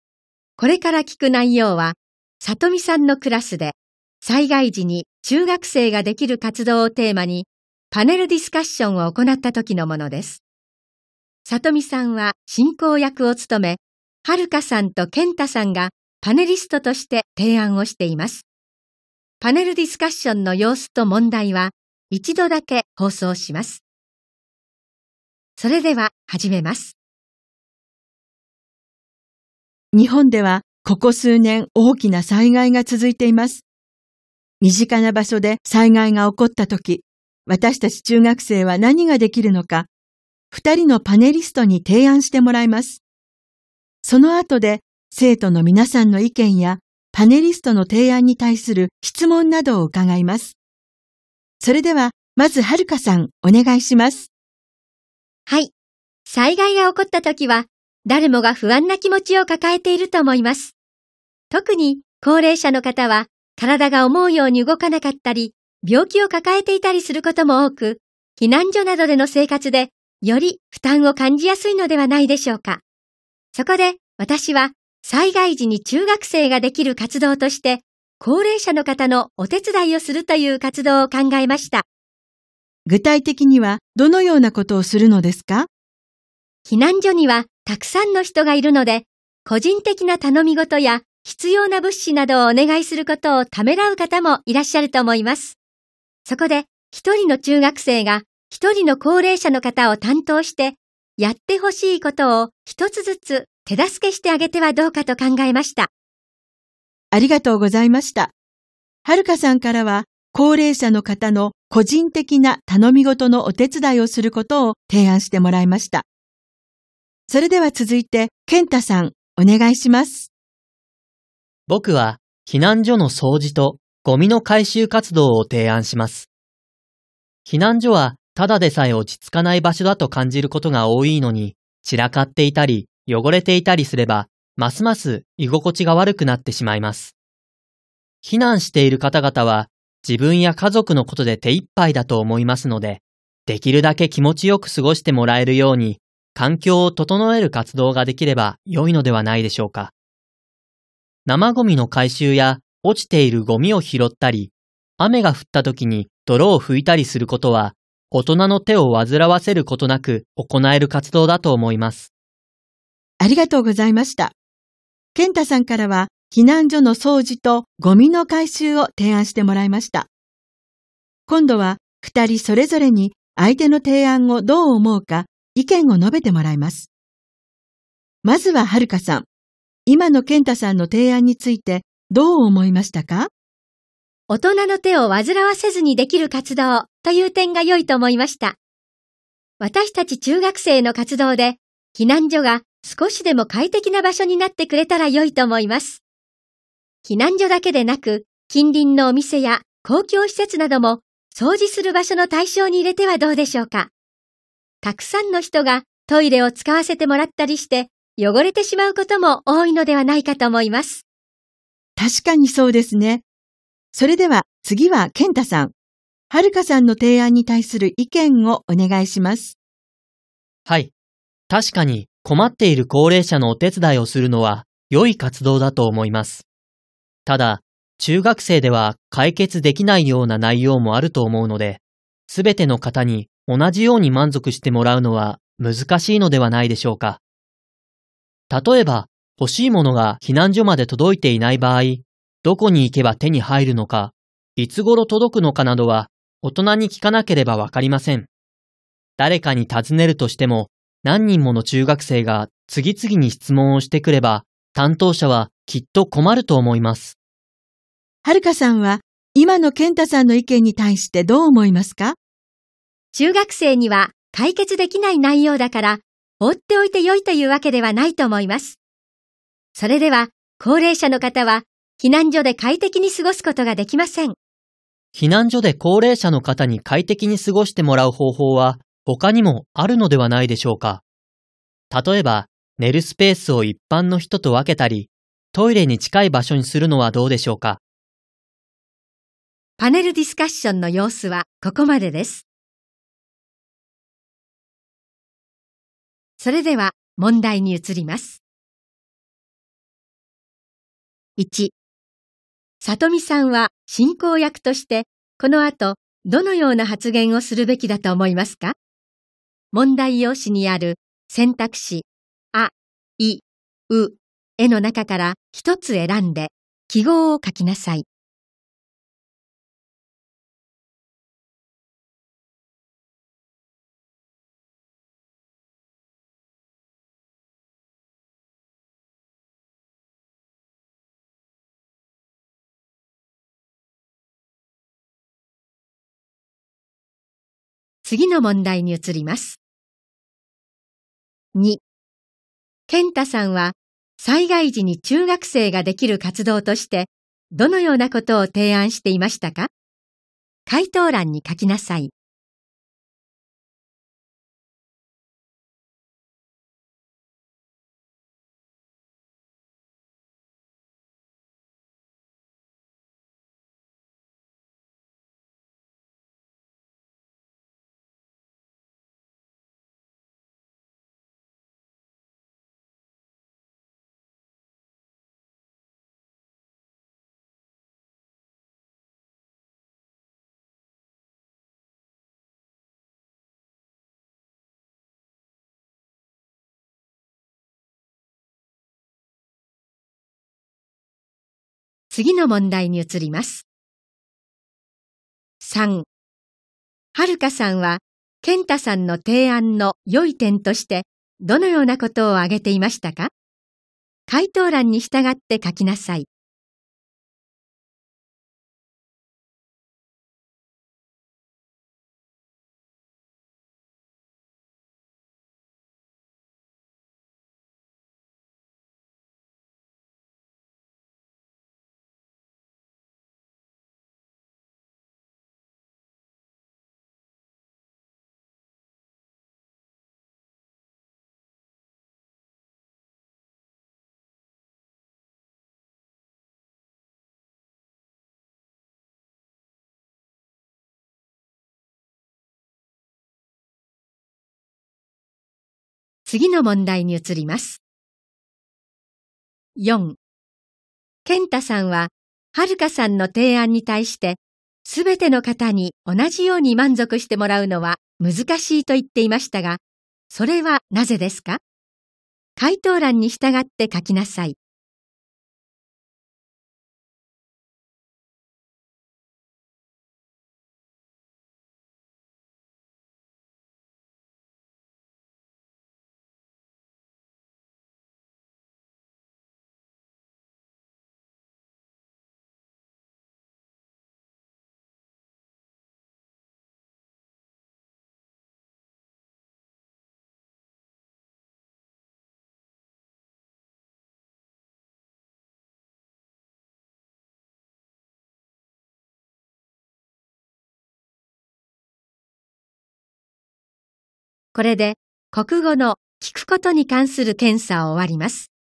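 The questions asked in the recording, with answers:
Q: 健太さんは災害時に中学生ができる活動としてどのようなことを提案していましたか?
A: 避難所の掃除とゴミの回収活動

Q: はるかさんは、健太さんの提案の良い点として、どのようなことを挙げていましたか?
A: 大人の手を煩わせずにできる活動という点

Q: 健太さんは、はるかさんの提案に対して、すべての方に同じように満足してもらうのは難しいと言っていましたが、それはなぜですか?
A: 中学生では解決できない内容もあるから(欲しい物の入手先や届く時期などは大人に聞かなければわからないから)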